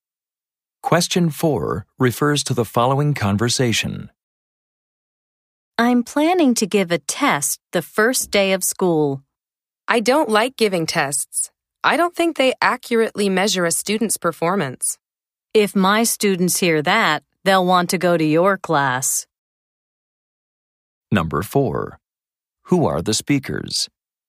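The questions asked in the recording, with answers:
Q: Who are the speakers?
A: Teachers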